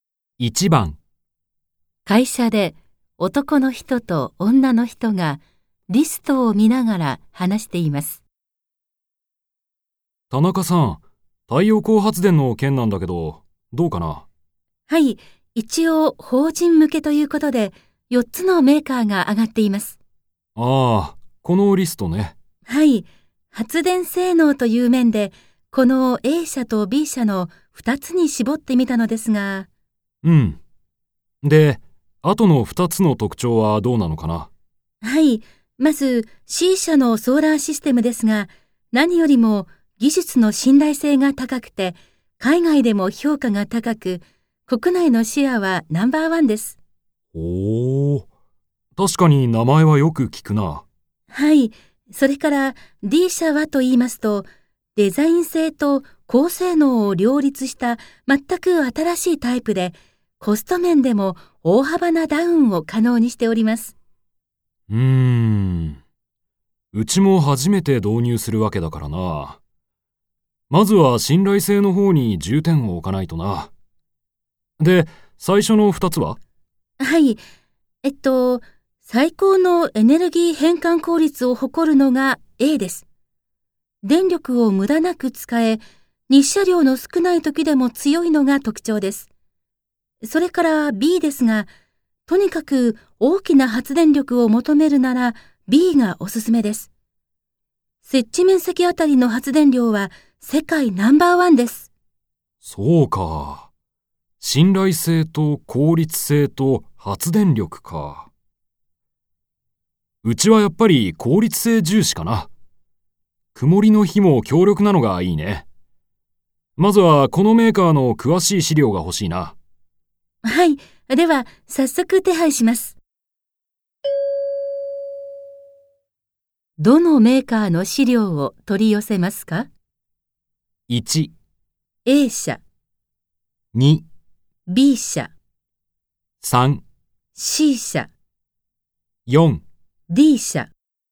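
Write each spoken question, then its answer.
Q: どのメーカーの資料を取り寄せますか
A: 1: A 社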